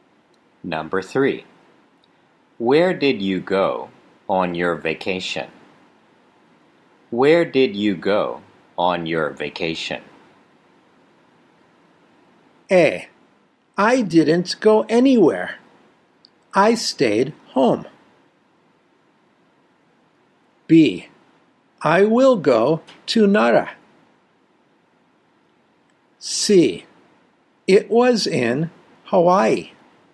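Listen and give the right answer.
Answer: A: I didn't go anywhere. I stayed home.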